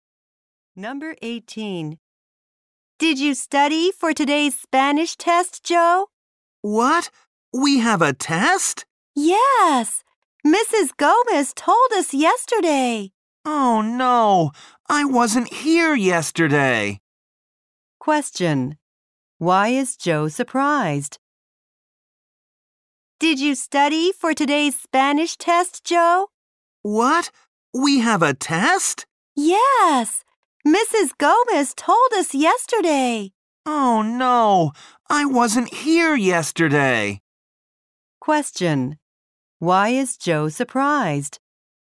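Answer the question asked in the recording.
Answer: He didn't know about the test.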